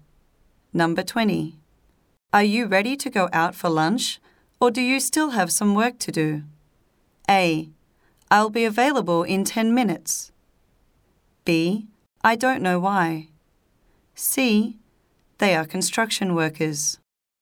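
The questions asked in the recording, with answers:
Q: Are you ready to go out for lunch, or do you still have some work to do?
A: A: I'll be available in 10 minutes.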